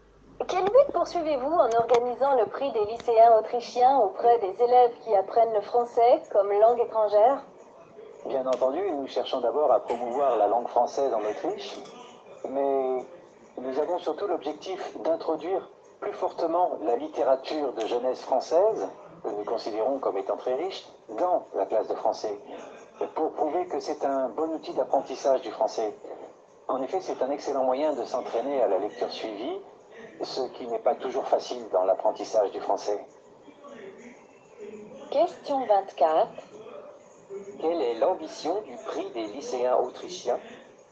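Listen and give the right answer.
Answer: Promouvoir le français en Autriche et surtout faire entrer la littérature de jeunesse française en classe de français comme outil d'apprentissage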